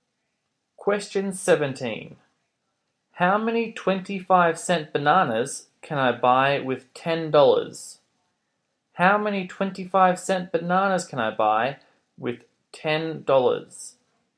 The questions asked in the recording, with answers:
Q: How many 25-cent bananas can I buy with $10?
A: you could buy 40 bananas.